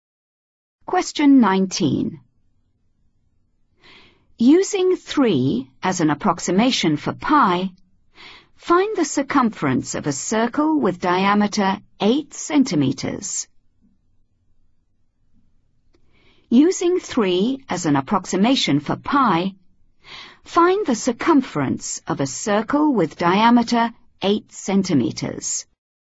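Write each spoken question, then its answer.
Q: Using 3 as an approximation for pi, find the circumference of a circle with diameter 8 centimeters.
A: 24 cm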